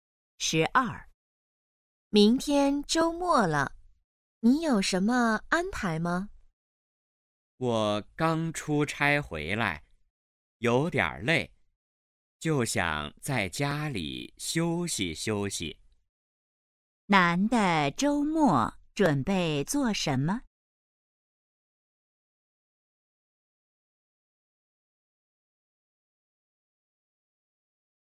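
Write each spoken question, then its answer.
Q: 男的周末准备做什么?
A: 在家休息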